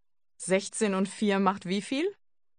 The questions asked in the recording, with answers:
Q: 16 und 4 macht wie viel?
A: 20. 20.